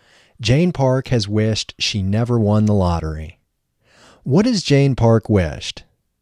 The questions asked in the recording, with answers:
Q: What has Jane Park wished?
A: She has wished she never won the lottery.